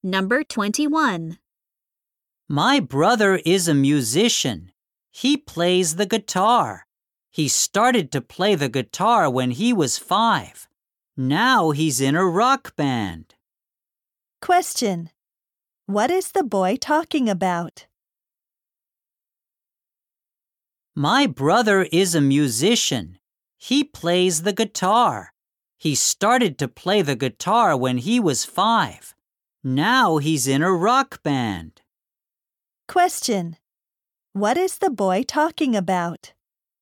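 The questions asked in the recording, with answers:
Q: What is the boy talking about?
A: His brother, a musician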